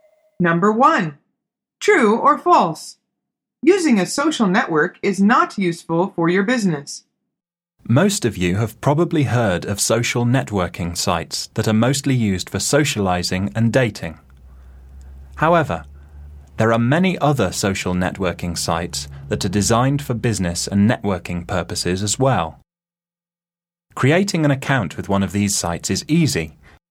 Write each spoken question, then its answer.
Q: Using a social network is not useful for your business.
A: The answer is false.